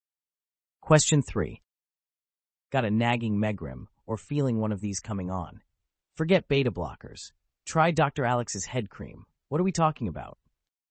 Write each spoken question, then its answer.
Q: Got a nagging megrim or feeling one of these coming on? Forget beta blockers. Try Dr. Alex's head cream. What are we talking about?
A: the answer is migraines.